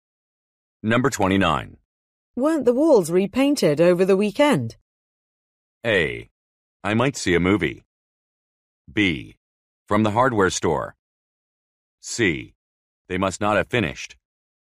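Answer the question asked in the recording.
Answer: C: They must not have finished.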